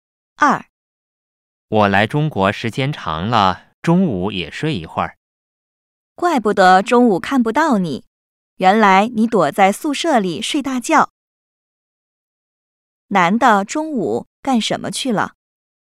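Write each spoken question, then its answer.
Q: 男的中午干什么去了?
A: 在宿舍里睡觉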